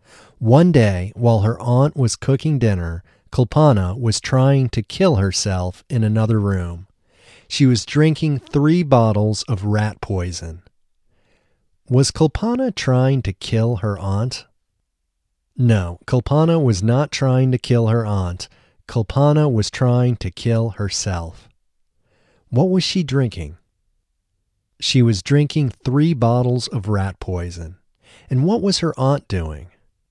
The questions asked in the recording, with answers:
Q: Was Kulpana trying to kill her aunt?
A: No, Kulpana was not trying to kill her aunt.